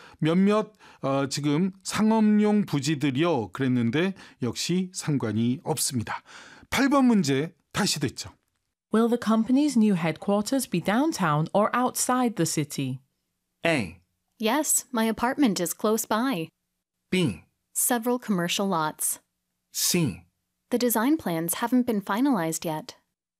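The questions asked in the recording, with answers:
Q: Will the company's new headquarters be downtown or outside the city?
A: C: The design plans haven't been finalized yet.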